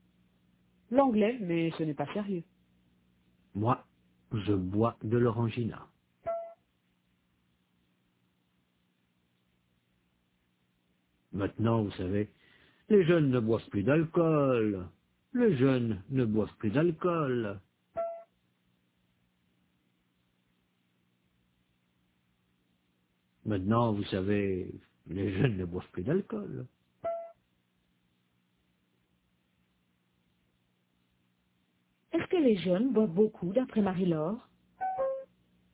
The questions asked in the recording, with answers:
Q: Est-ce que les jeunes boivent beaucoup, d'après Marie-Laure?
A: Non, ils ne boivent plus d'alcool.